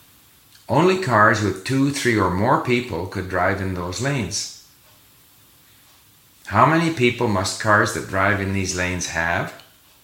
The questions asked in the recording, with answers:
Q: How many people must cars that drive in these lanes have?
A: Cars that drive in these lanes must have two, three, or more people.